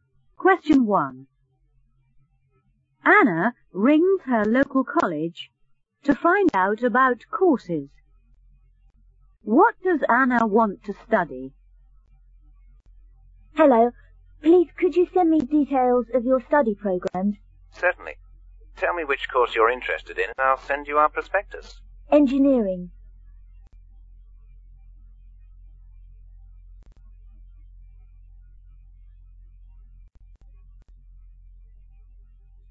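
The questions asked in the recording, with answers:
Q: What does Anna want to study?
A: Engineering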